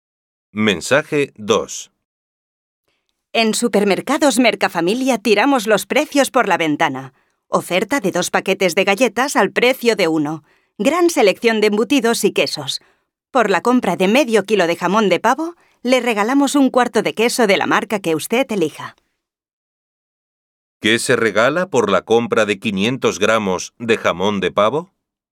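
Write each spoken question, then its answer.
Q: ¿Qué se regala por la compra de 500 gramos de jamón de pavo?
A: 1/4 de queso de la marca que elija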